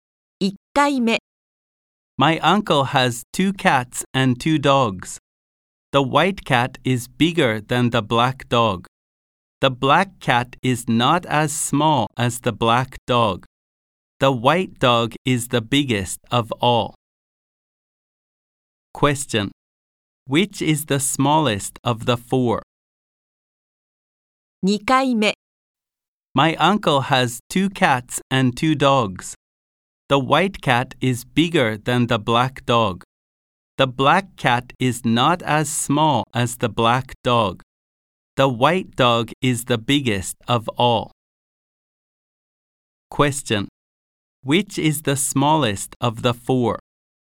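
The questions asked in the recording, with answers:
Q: Which is the smallest of the four?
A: The black dog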